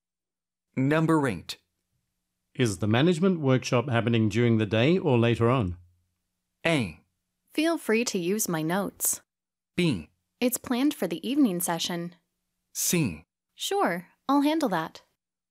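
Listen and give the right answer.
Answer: B: It's planned for the evening session.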